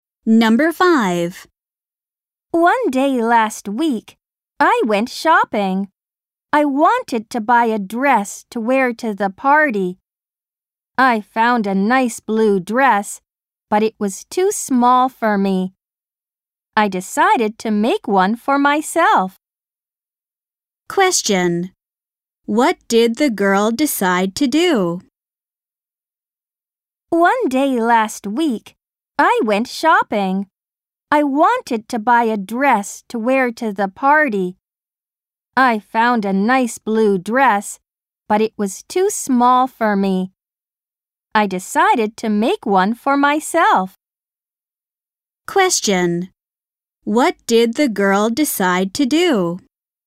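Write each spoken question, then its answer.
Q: What did the girl decide to do?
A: Make a dress for herself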